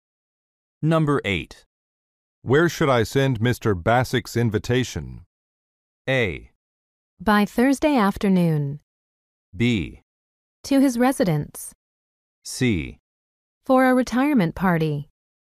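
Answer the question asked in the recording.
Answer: B: To his residence.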